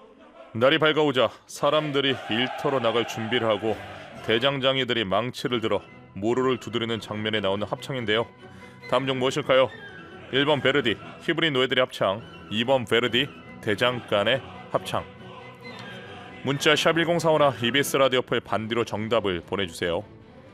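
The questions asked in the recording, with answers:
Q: 다음 중 무엇일까요? 1번 베르디, 히브리 노예들의 합창. 2번 베르디, 대장간의 합창.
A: 2: 베르디, 대장간의 합창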